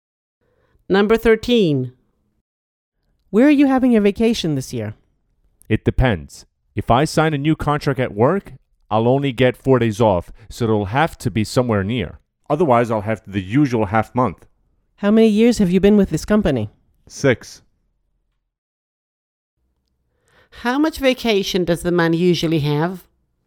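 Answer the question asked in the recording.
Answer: half a month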